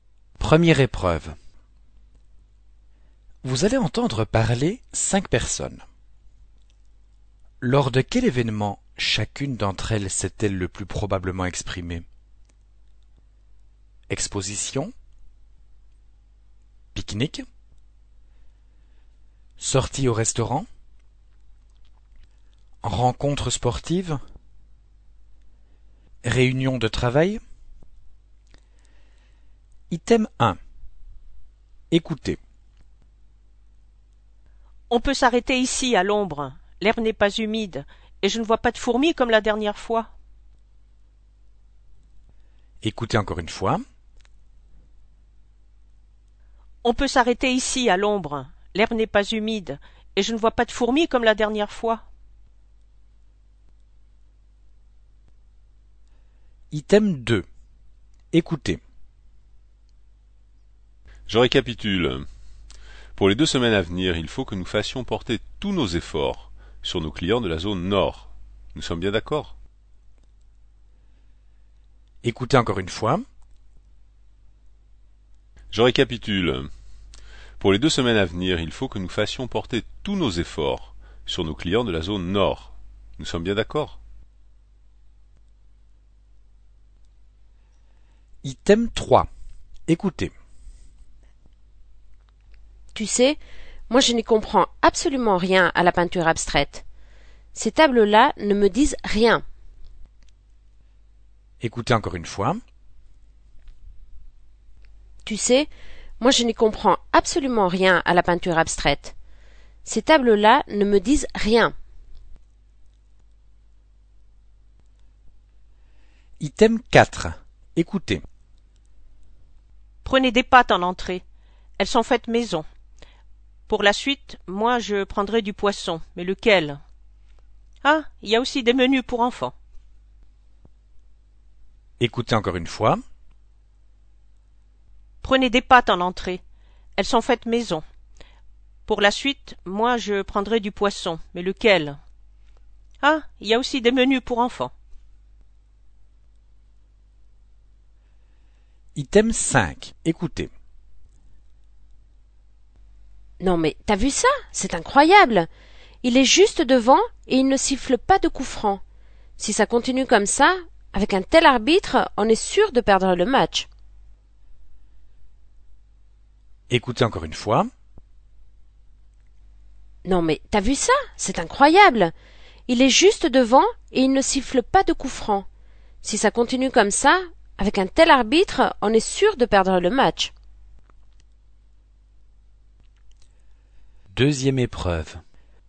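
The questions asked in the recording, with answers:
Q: Lors de quel événement chacune d'entre elles s'est-elle le plus probablement exprimée?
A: Pique-nique

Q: Lors de quel événement chacune d'entre elles s'est-elle le plus probablement exprimée?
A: Réunion de travail

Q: Lors de quel événement chacune d'entre elles s'est-elle le plus probablement exprimée?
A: Exposition

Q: Lors de quel événement chacune d'entre elles s'est-elle le plus probablement exprimée?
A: Sortie au restaurant

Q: Lors de quel événement chacune d'entre elles s'est-elle le plus probablement exprimée?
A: Rencontre sportive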